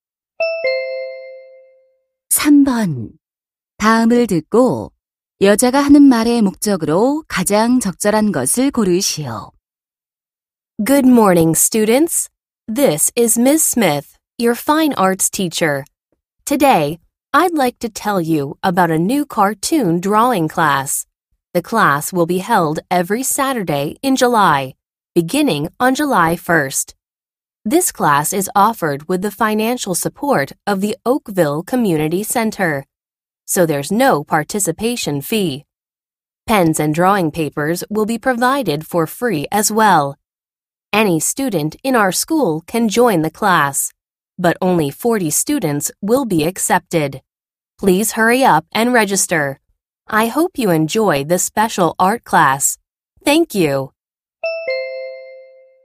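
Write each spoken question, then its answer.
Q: 다음을 듣고 여자가 하는 말의 목적으로 가장 적절한 것을 고르시오.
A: 새 만화 그리기 수업을 홍보하고 등록을 권하려고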